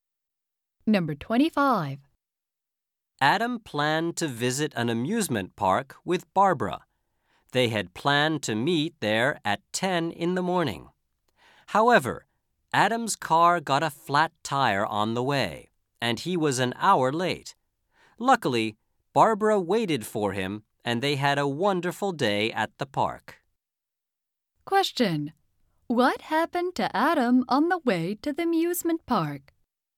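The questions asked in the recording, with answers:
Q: What happened to Adam on the way to the amusement park?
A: His car got a flat tire.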